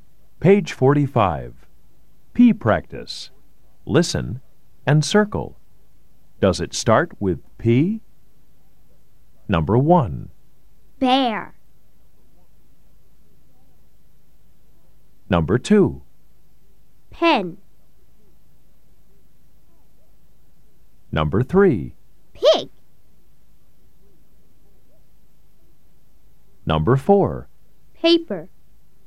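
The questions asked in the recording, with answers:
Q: Bear.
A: No

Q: Paper.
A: Yes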